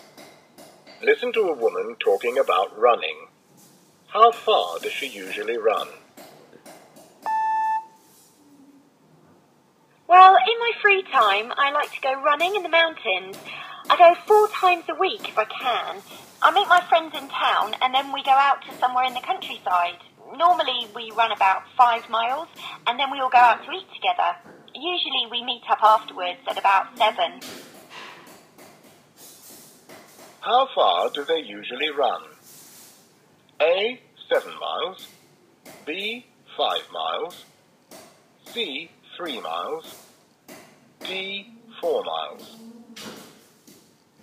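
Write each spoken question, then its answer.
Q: How far do they usually run?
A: B: 5 miles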